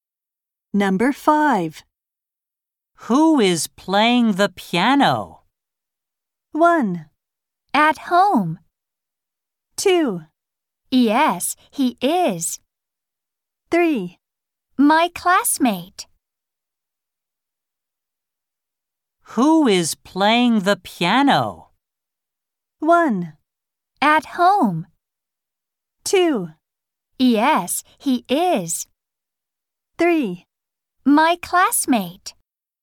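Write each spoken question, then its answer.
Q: Who is playing the piano?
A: 3: My classmate.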